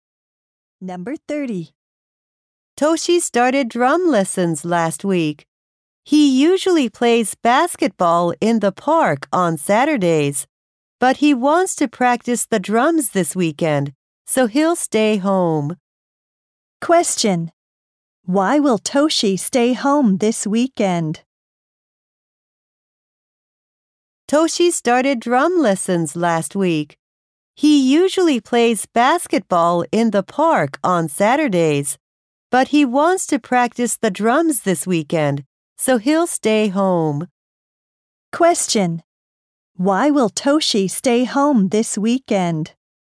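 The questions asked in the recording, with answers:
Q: Why will Toshi stay home this weekend?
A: To practice the drums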